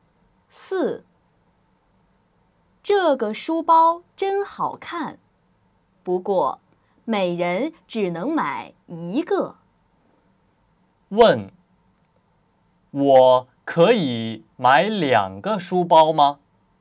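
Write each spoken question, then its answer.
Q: 问,我可以买两个书包吗?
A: 不可以,每人只能买一个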